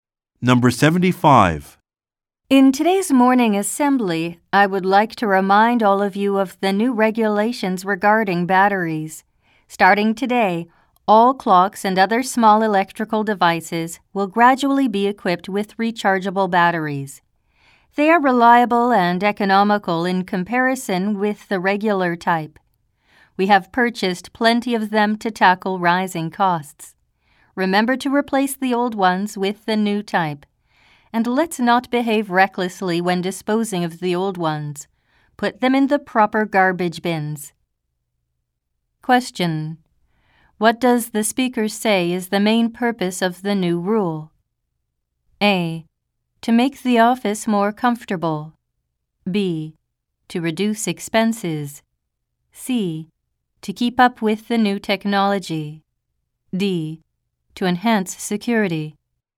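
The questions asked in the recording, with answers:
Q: What does the speaker say is the main purpose of the new rule?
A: B: To reduce expenses.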